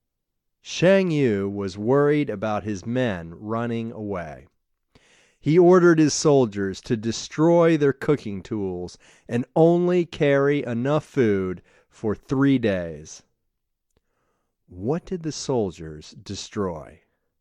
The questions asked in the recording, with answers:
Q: What did the soldiers destroy?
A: The soldiers destroyed their cooking tools.